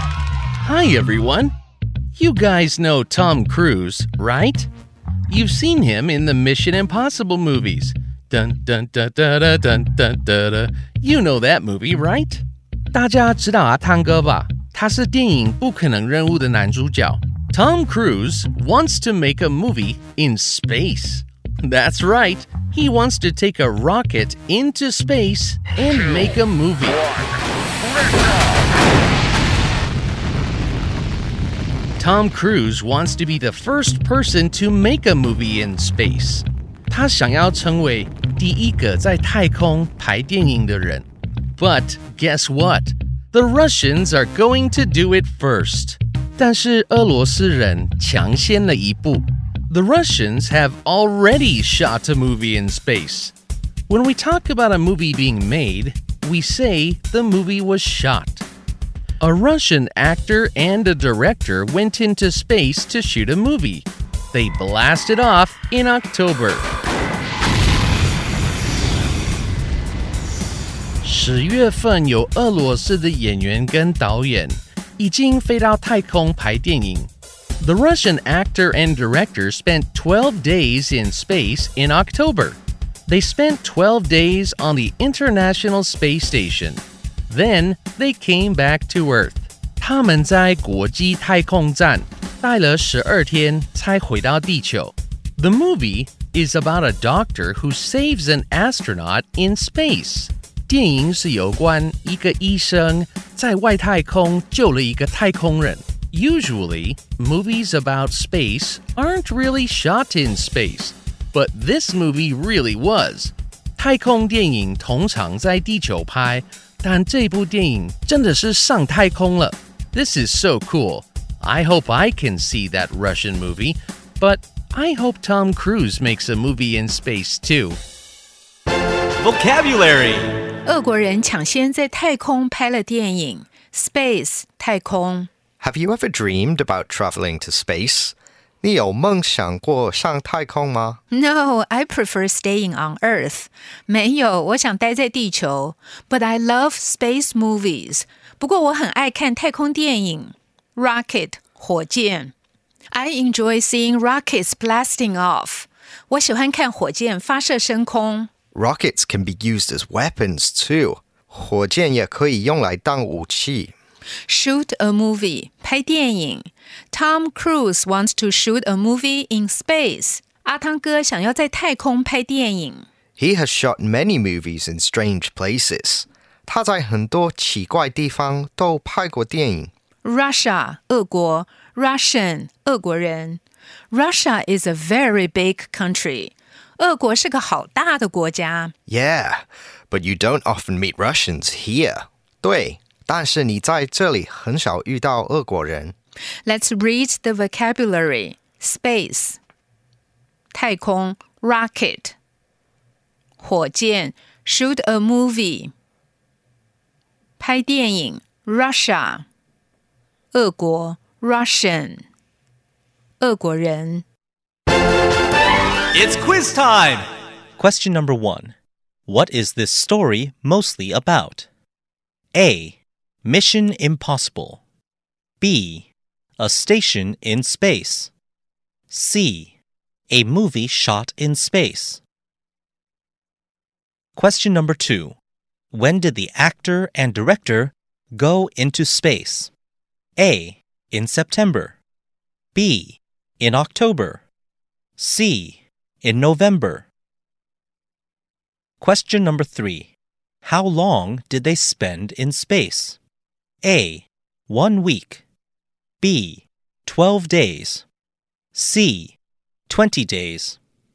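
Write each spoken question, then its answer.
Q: What is this story mostly about?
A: C: A movie shot in space.

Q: When did the actor and director go into space?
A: B: In October.

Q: How long did they spend in space?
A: B: 12 days.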